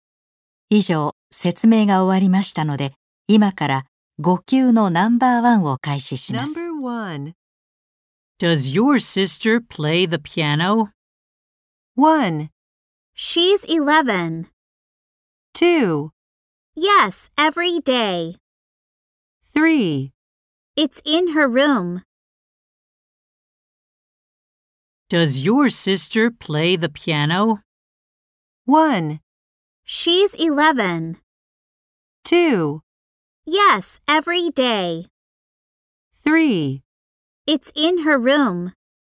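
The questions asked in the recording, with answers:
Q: Does your sister play the piano?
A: 2: Yes, every day.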